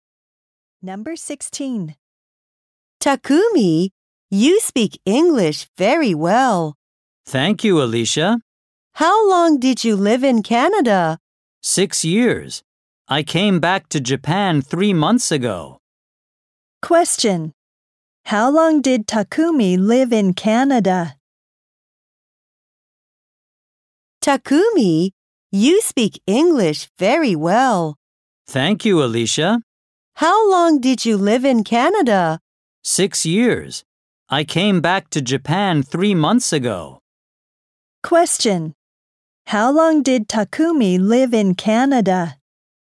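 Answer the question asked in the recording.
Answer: 6 years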